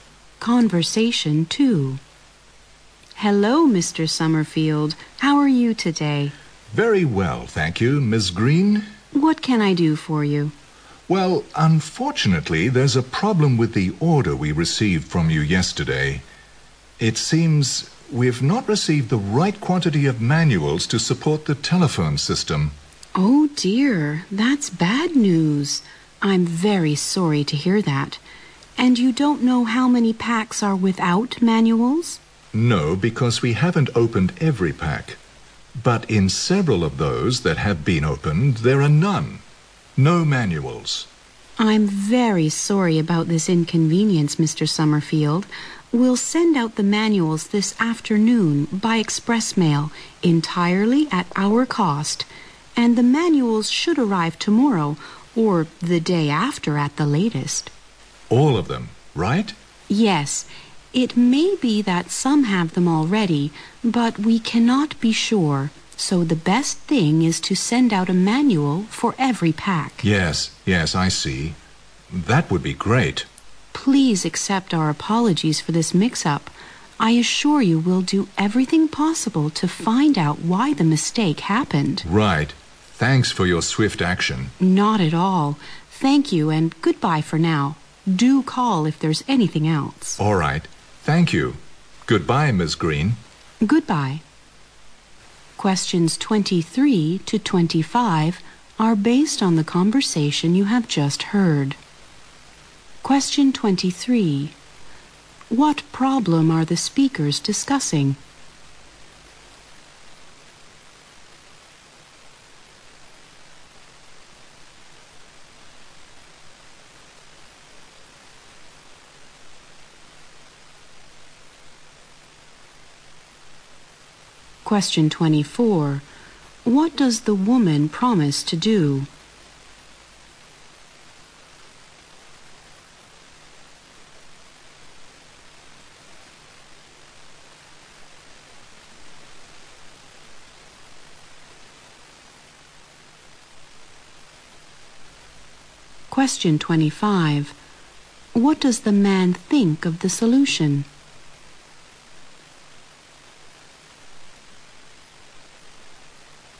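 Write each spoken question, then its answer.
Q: What problem are the speakers discussing?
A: Some packs were delivered without manuals.

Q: What does the woman promise to do?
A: Send a manual for every pack by express mail, at her company's cost.

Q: What does the man think of the solution?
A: He thinks it's great and thanks her for acting quickly.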